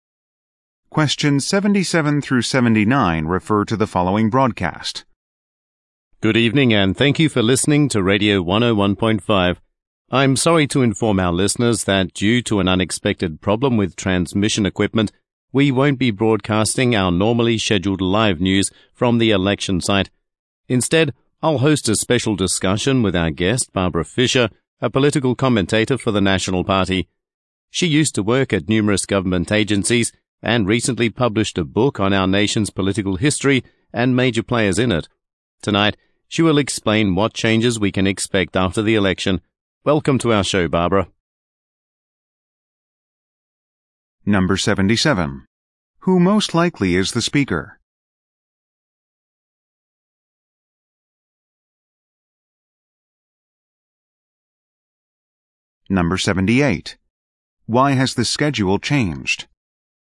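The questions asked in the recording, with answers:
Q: Who most likely is the speaker?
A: A radio host

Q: Why has the schedule changed?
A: There is a problem with the transmission equipment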